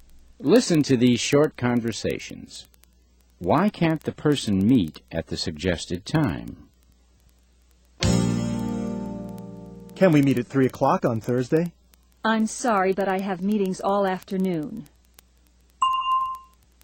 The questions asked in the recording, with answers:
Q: Why can't the person meet at the suggested time?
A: She has meetings in the afternoon.